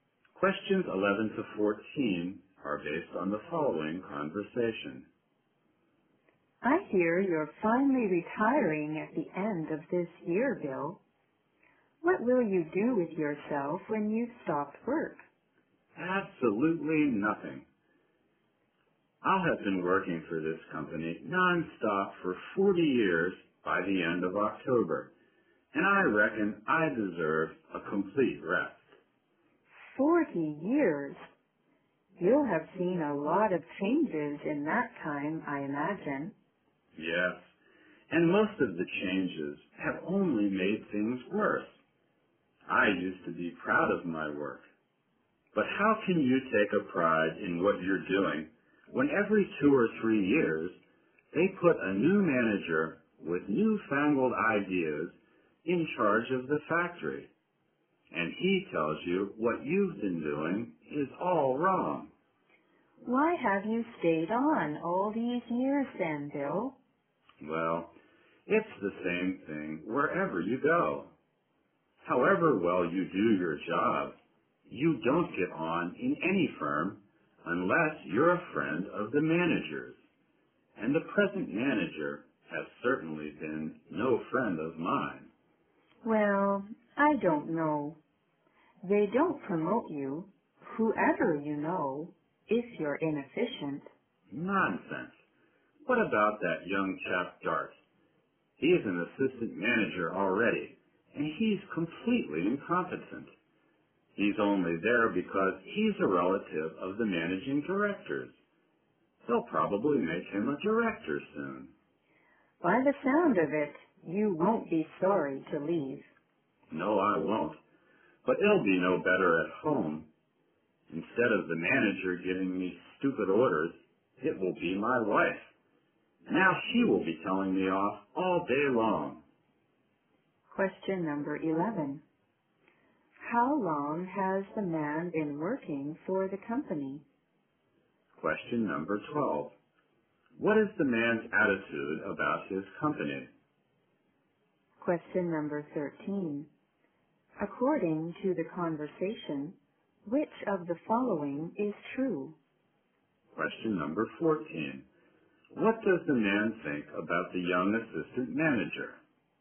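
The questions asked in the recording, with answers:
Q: How long has the man been working for the company?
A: 40 years

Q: What is the man's attitude about his company?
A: He is dissatisfied with and critical of it

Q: What does the man think about the young assistant manager?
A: He is completely incompetent and only got the job because he is a relative of the managing director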